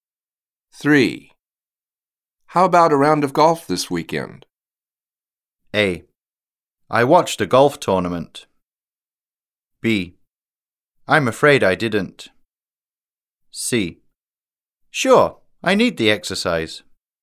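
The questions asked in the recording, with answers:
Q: How about a round of golf this weekend?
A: C: Sure, I need the exercise.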